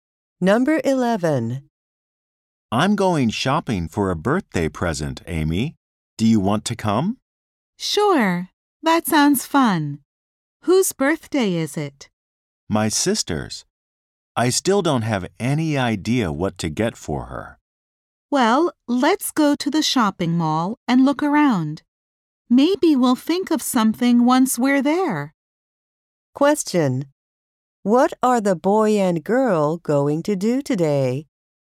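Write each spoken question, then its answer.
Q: What are the boy and girl going to do today?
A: Go shopping for a birthday present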